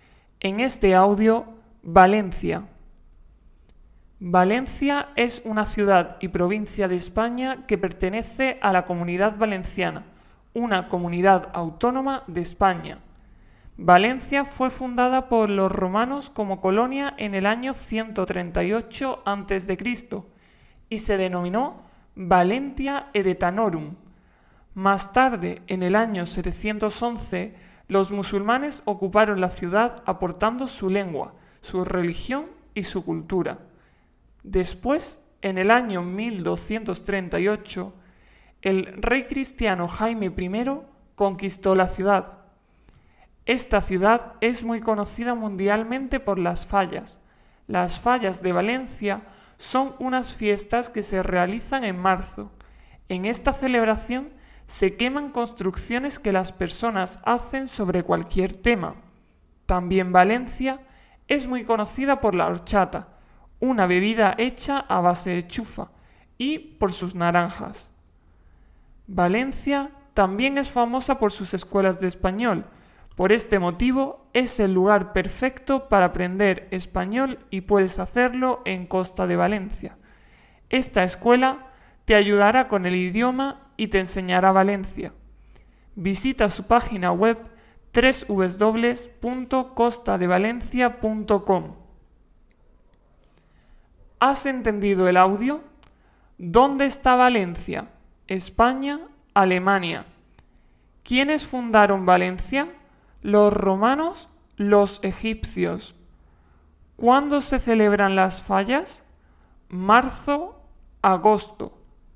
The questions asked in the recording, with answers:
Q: ¿Dónde está Valencia?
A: España

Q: ¿Quiénes fundaron Valencia?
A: los romanos

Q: ¿Cuándo se celebran las fallas?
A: marzo